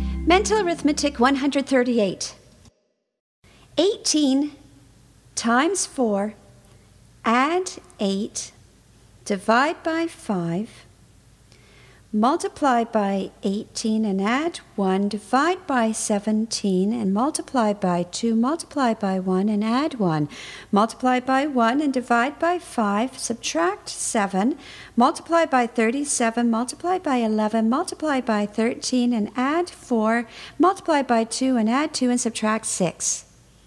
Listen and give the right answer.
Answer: And the answer is 4.